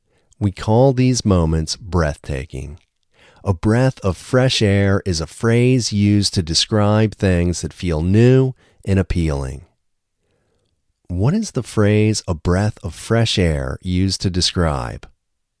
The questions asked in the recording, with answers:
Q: What is the phrase a breath of fresh air used to describe?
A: A breath of fresh air is a phrase used to describe things that feel new and appealing.